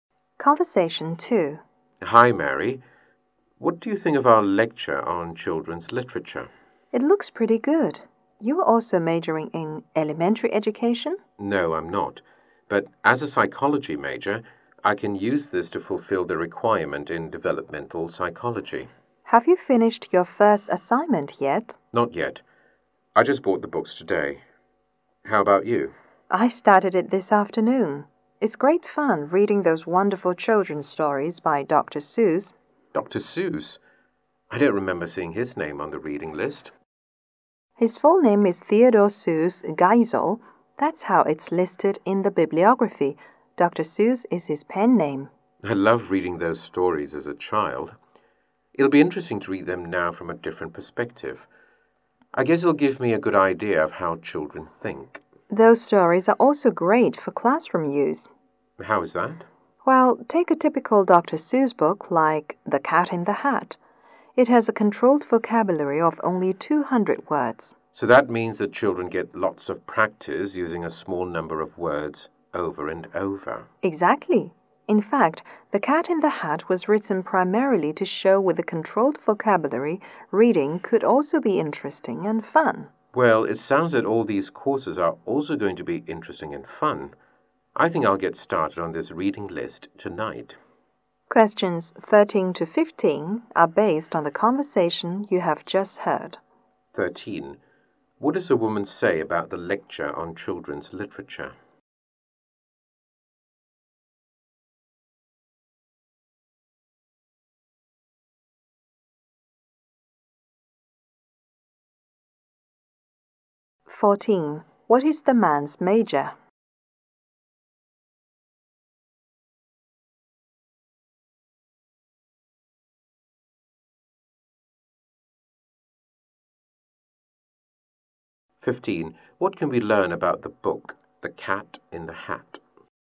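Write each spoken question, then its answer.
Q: What does a woman say about the lecture on children's literature?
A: It looks pretty good

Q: What can we learn about the book, The Cat in the Hat?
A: It uses a controlled vocabulary of only 200 words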